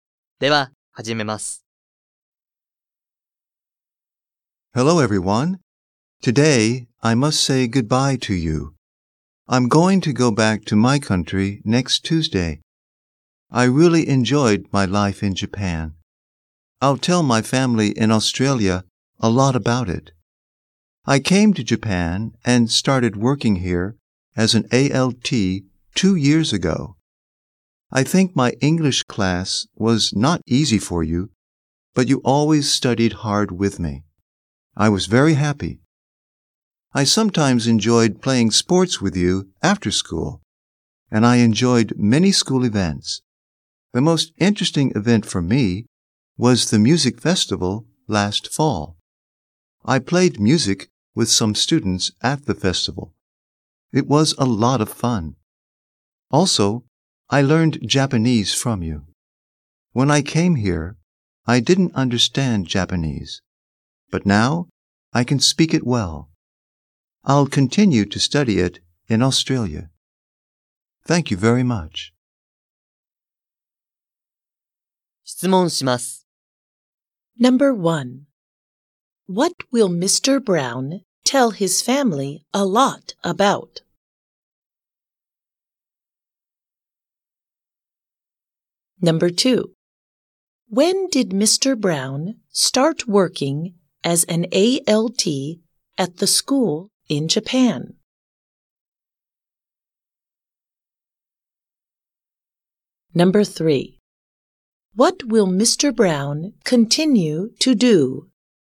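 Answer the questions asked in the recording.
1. His life in Japan
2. Two years ago
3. Study Japanese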